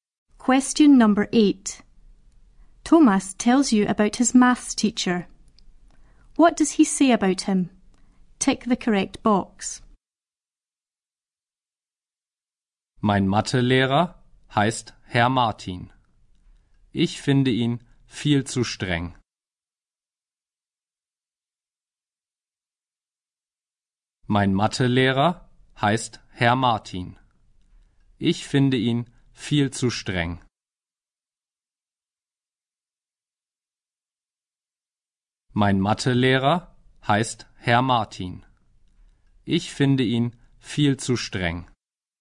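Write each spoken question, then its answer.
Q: What does he say about him?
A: He finds him far too strict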